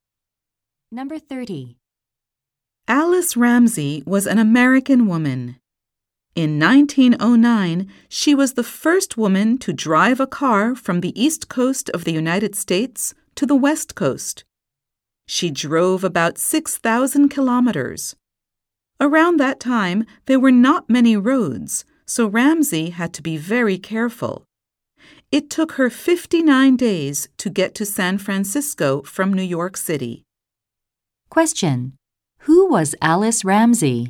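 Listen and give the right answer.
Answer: The first woman to drive across the US from coast to coast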